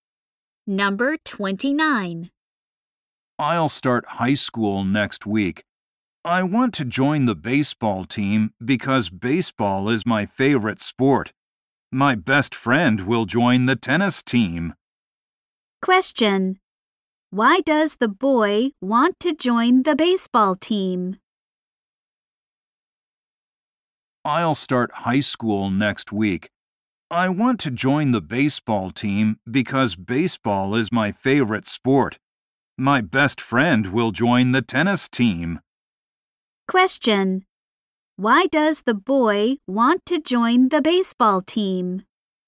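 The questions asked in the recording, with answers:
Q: Why does the boy want to join the baseball team?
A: Baseball is his favorite sport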